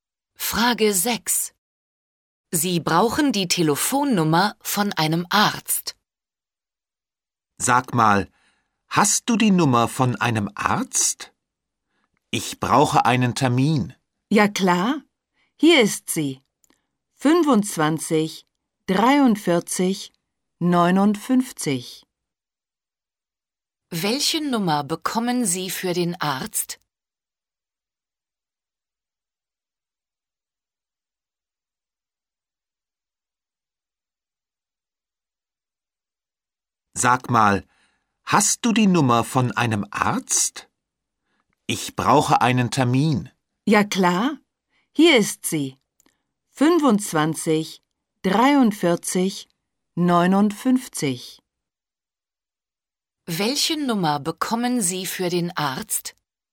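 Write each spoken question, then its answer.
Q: Welche Nummer bekommen Sie für den Arzt?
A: 25 43 59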